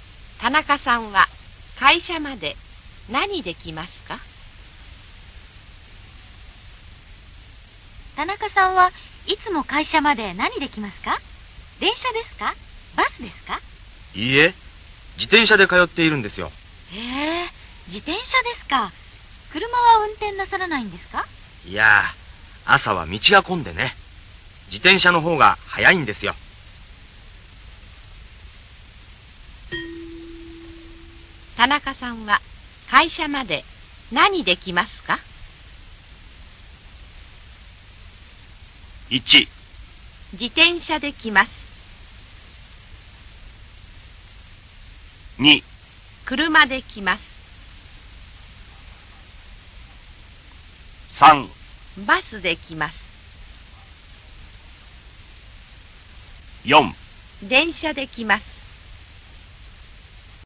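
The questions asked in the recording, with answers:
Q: 田中さんは会社まで何で来ますか?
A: 1: 自転車で来ます。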